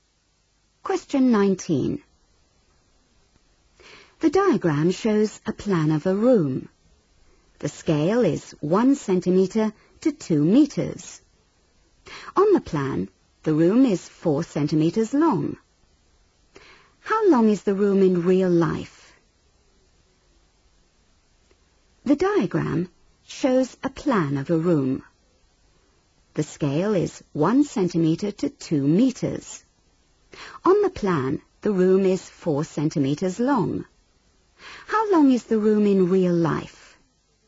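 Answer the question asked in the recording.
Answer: 8 metres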